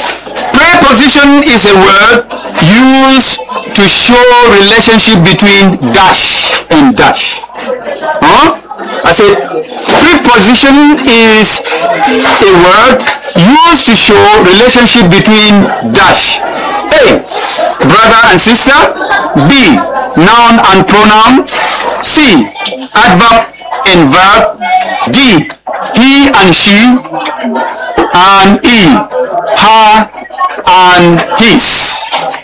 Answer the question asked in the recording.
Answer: Noun and pronoun.